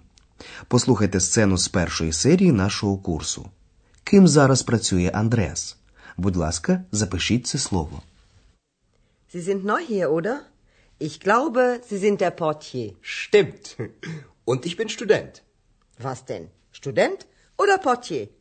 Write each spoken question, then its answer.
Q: Ким зараз працює Андреас?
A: Отже, він працює портьє.